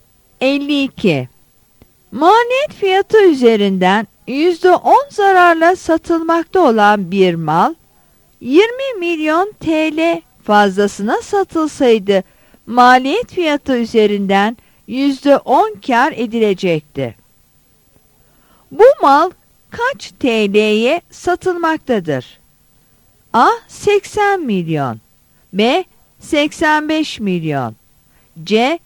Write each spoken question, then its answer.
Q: Bu mal kaç TL'ye satılmaktadır?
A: Yanıt C'dir.